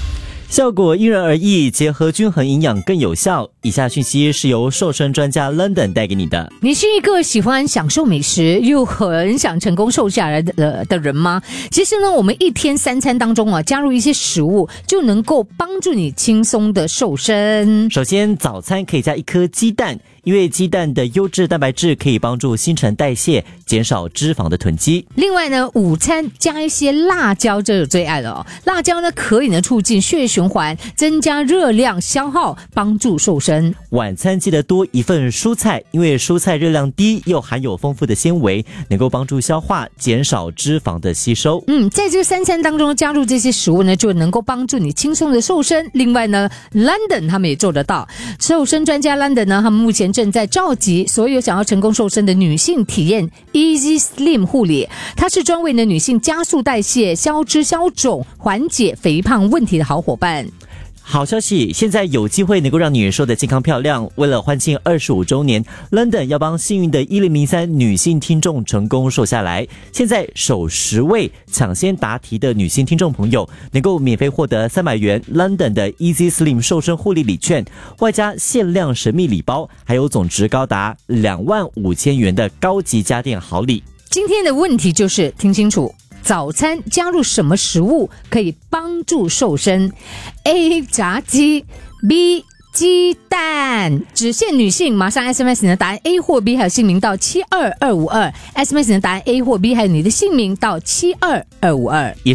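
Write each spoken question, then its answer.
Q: 早餐加入什么食物可以帮助瘦身?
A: B: 鸡蛋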